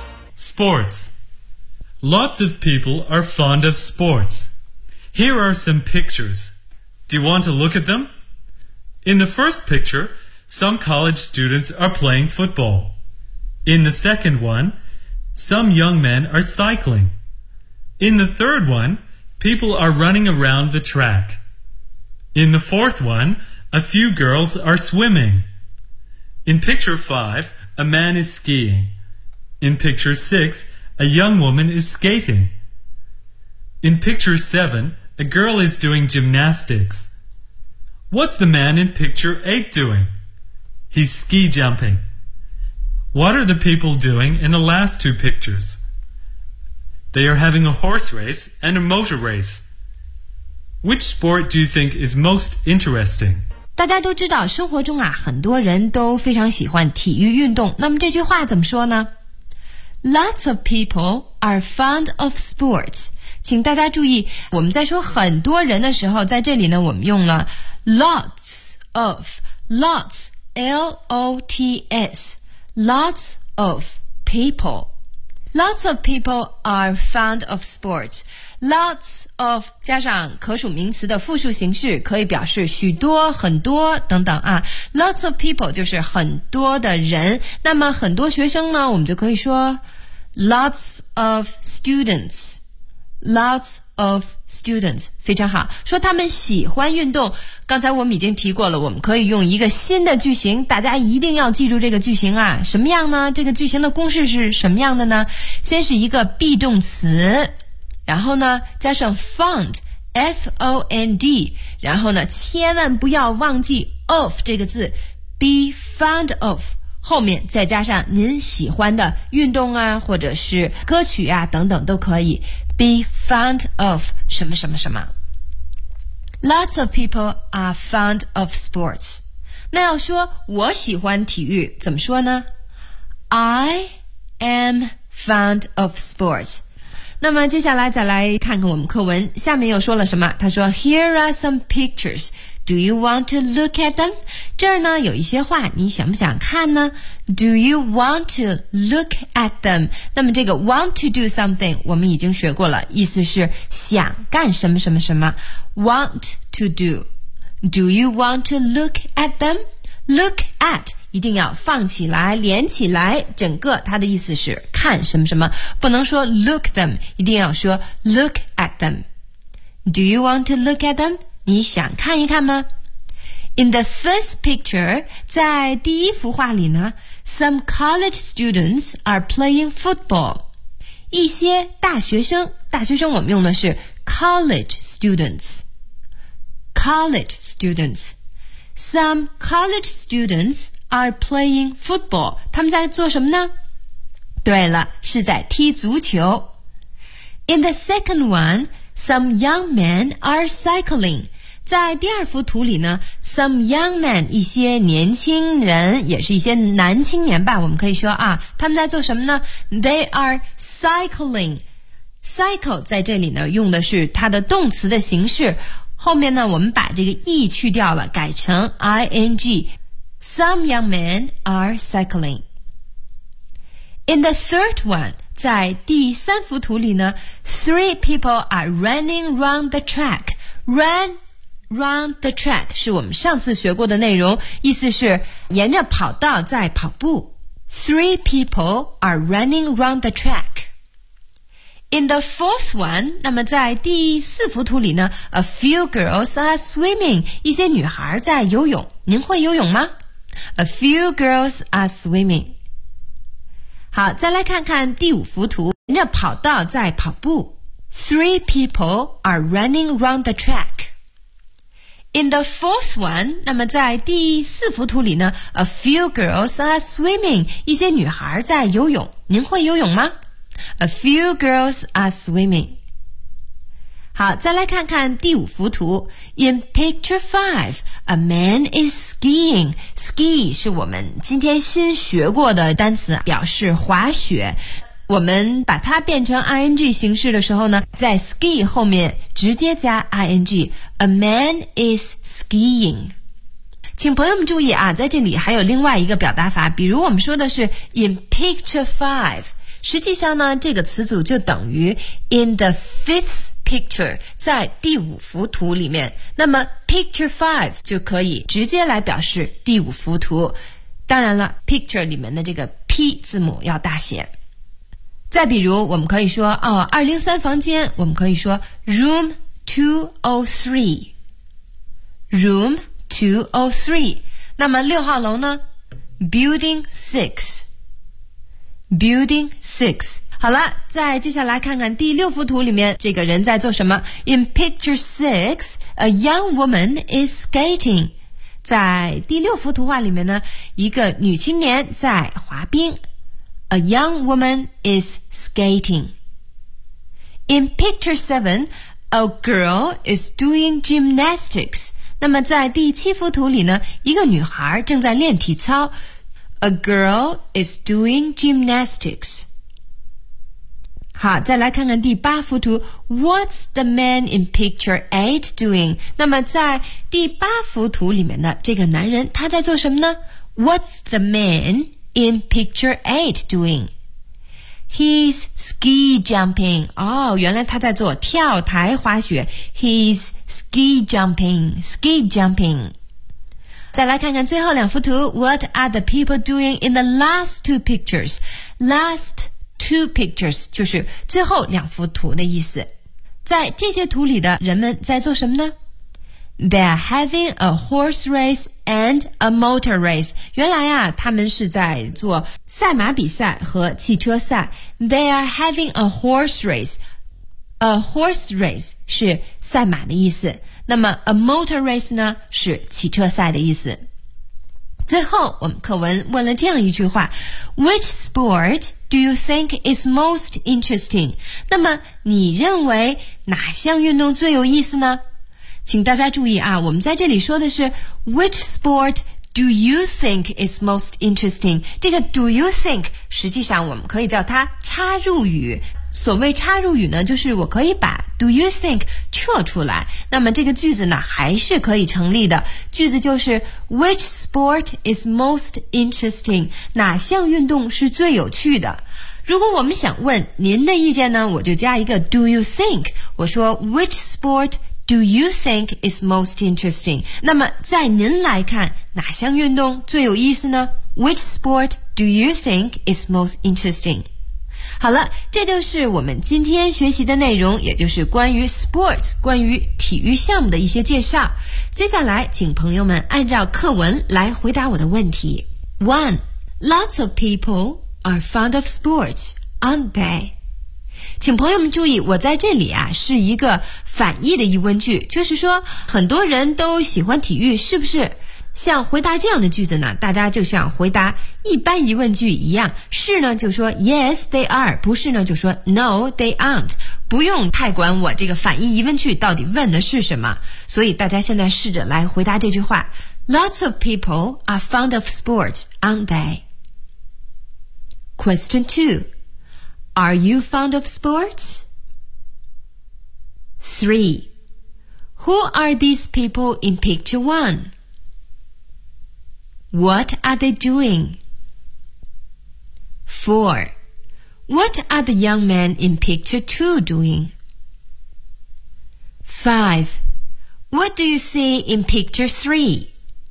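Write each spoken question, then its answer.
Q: Lots of people are fond of sports, aren't they?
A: Yes, they are.

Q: Who are these people in picture 1?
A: They are college students.

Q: What are they doing?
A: They are playing football.

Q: What are the young men in picture 2 doing?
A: They are cycling.

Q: What do you see in picture 3?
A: People running round the track.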